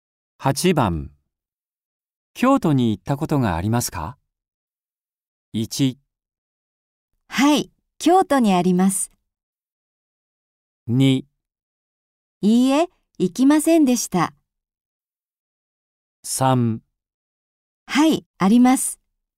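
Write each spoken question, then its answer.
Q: 京都に行ったことがありますか?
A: 3: はい、あります。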